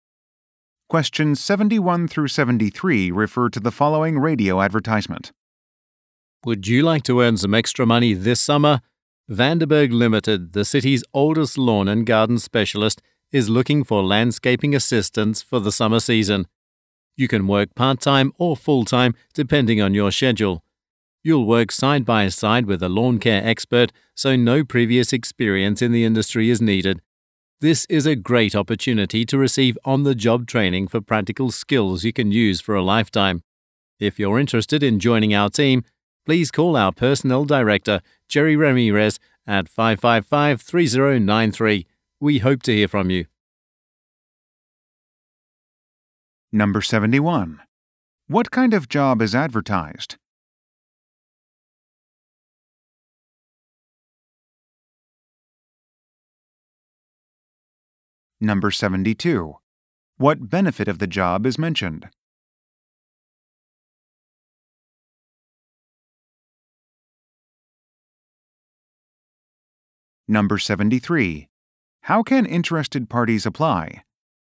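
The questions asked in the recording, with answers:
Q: What kind of job is advertised?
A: Landscaping assistant

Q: What benefit of the job is mentioned?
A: On-the-job training

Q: How can interested parties apply?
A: Call the personnel director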